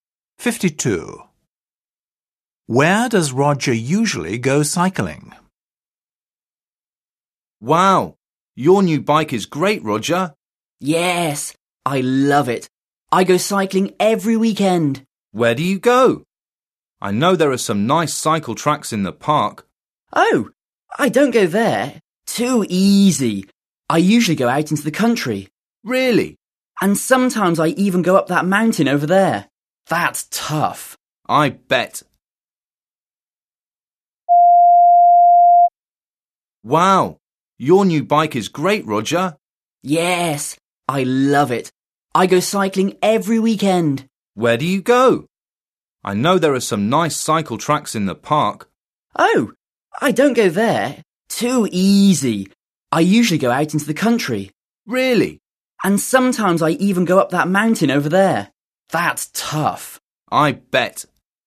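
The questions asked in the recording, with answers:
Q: Where does Roger usually go cycling?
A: in the country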